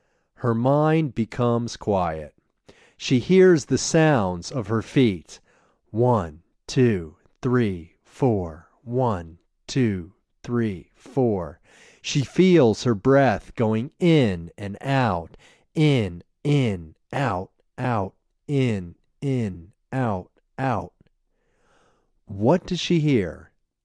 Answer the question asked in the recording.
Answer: She hears the sounds of her feet.